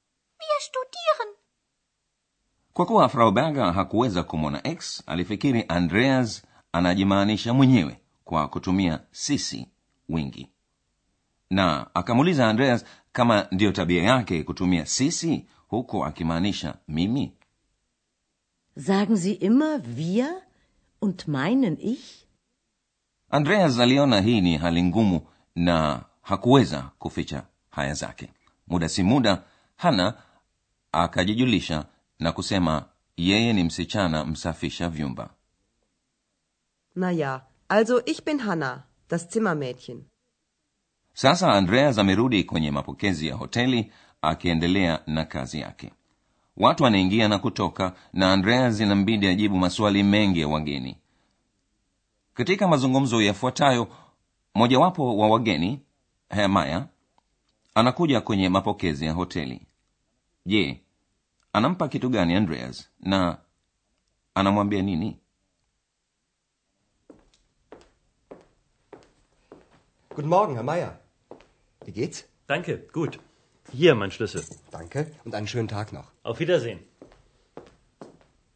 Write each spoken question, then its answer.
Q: je anampa kitu gani andreas na anamwambia nini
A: hemaya anaweka ufunguo wake juu ya meza ya mapokezi na anamwambia andreas huu hapa ufunguo wangu hier mein schlüssel